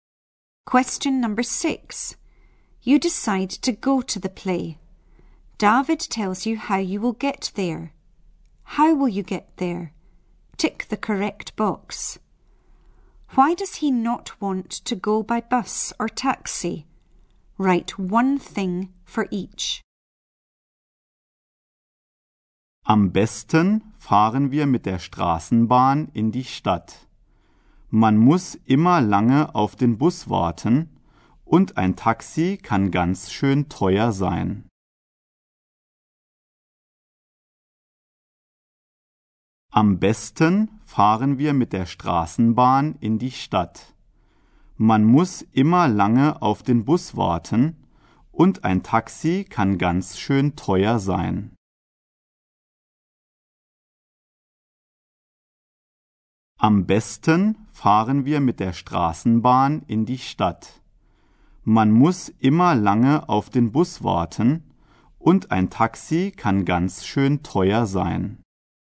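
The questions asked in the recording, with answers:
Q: Why does he not want to go by bus or taxi?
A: You always have to wait a long time for the bus; a taxi is very expensive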